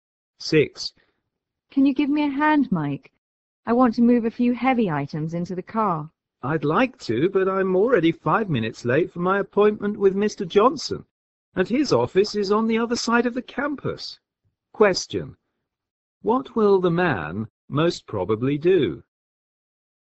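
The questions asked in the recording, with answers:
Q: What will the man most probably do?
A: Go to his appointment with Mr. Johnson instead of helping the woman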